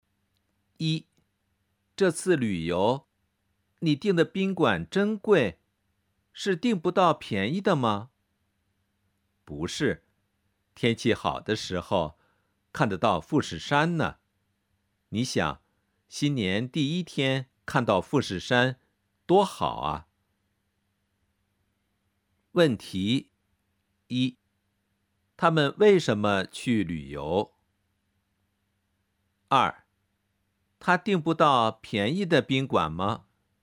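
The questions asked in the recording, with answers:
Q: 他们为什么去旅游?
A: 新年第一天去看富士山

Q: 他订不到便宜的宾馆吗?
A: 不是,他订贵的宾馆是为了天气好时能看到富士山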